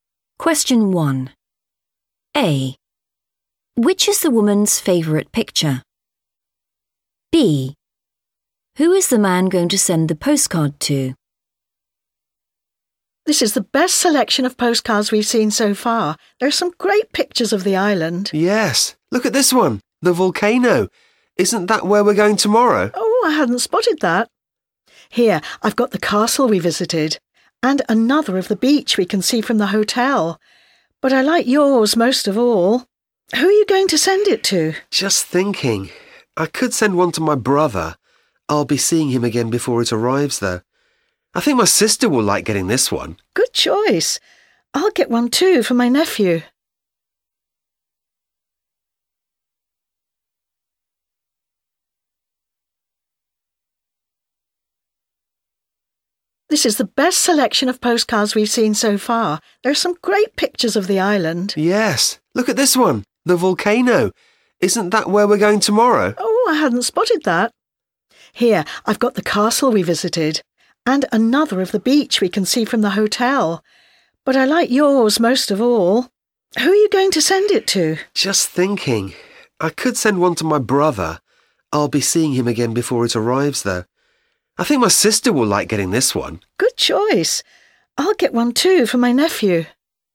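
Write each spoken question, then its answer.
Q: Which is the woman's favourite picture?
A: the volcano

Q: Who is the man going to send the postcard to?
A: his sister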